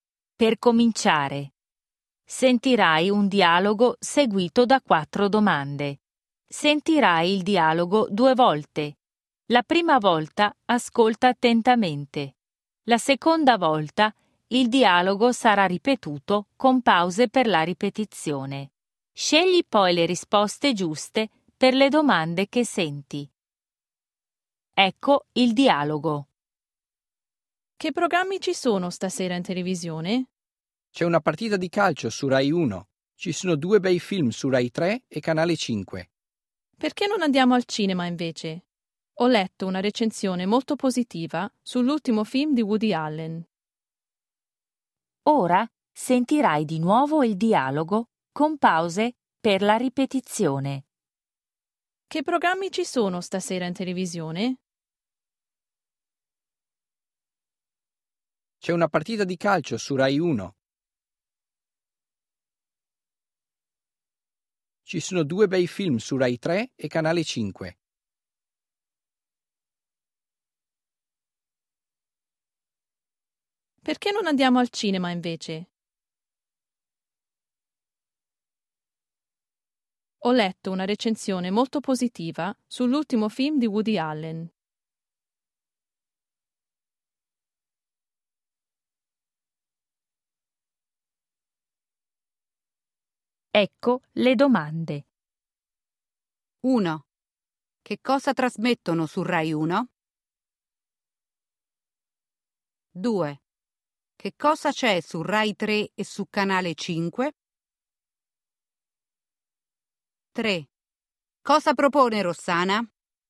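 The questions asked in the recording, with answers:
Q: Che cosa trasmettono su Rai 1?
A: una partita di calcio

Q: Che cosa c'è su Rai 3 e su Canale 5?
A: due bei film

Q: Cosa propone Rossana?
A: di andare al cinema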